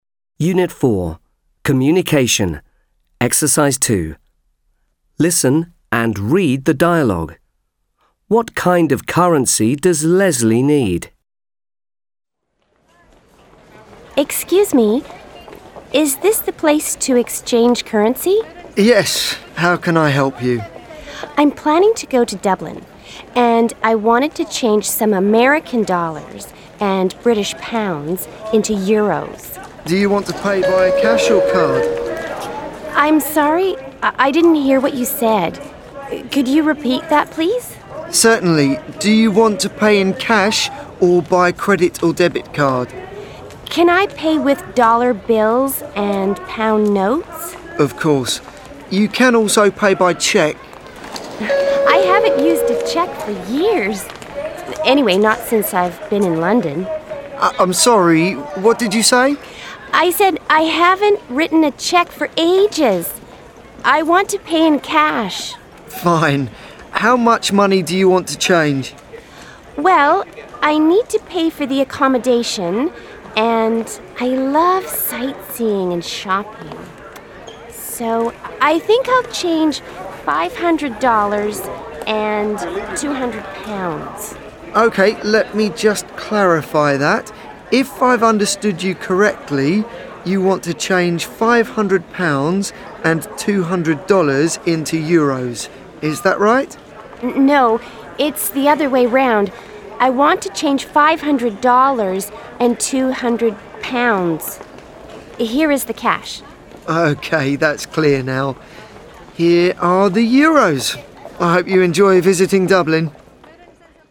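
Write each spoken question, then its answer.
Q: What kind of currency does Leslie need?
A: Euros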